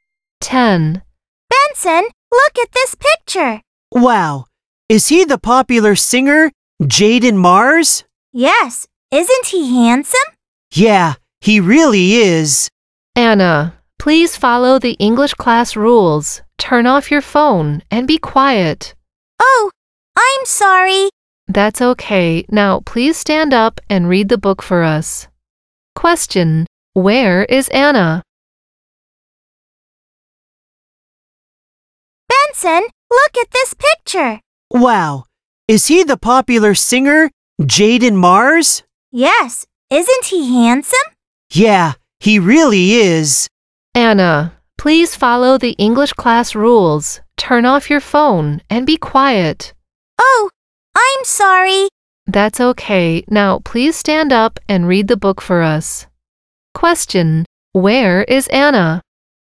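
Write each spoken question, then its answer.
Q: Where is Anna?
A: In English class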